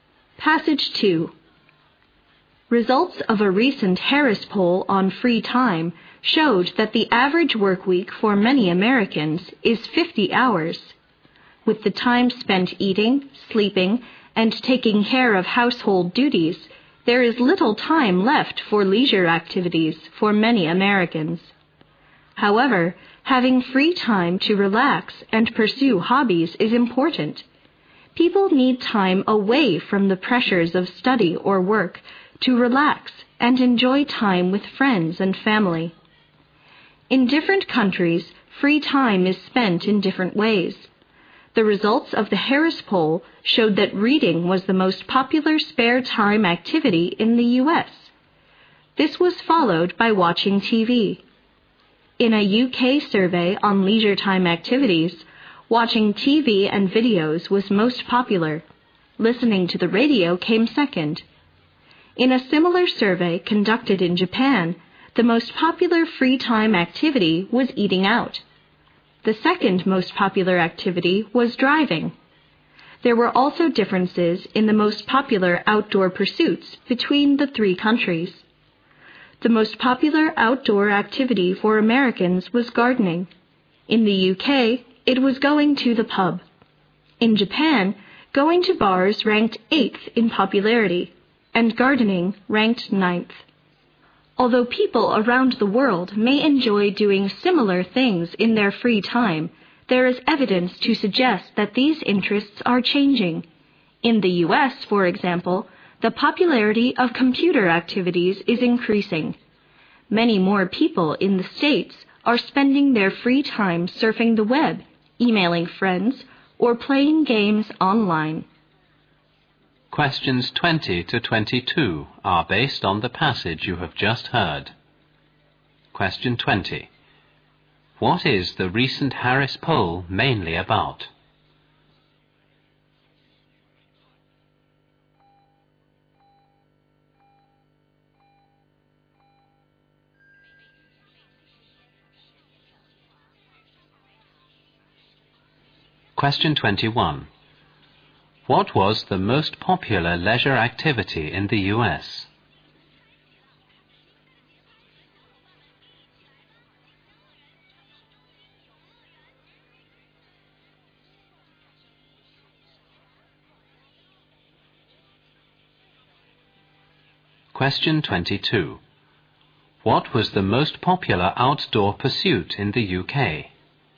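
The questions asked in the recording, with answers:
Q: What is the recent Harris poll mainly about?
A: How people spend their free time

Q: What was the most popular leisure activity in the U.S.?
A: Reading

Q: What was the most popular outdoor pursuit in the U.K.?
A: Going to the pub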